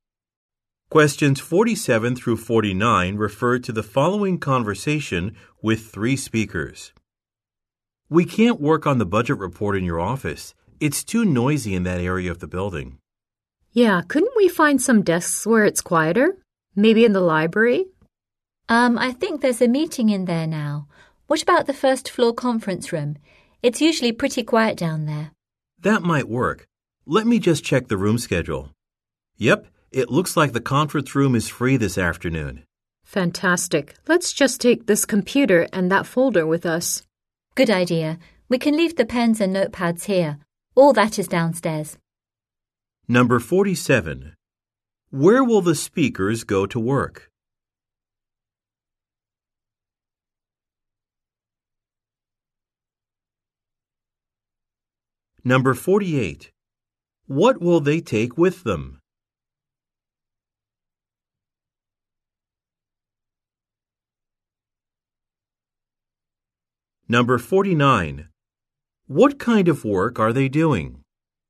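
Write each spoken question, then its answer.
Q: Where will the speakers go to work?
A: The first floor conference room

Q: What will they take with them?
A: A computer and a folder

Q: What kind of work are they doing?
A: A budget report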